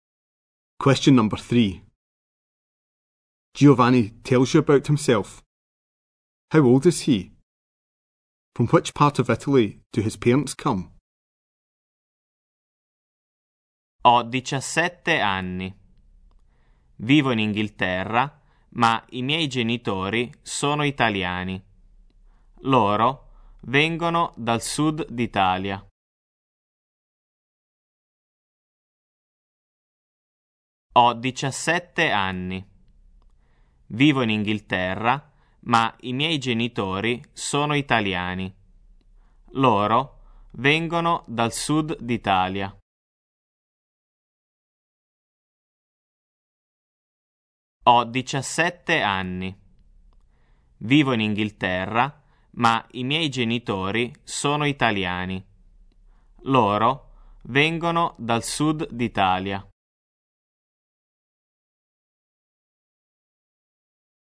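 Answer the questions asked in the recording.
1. 17
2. The south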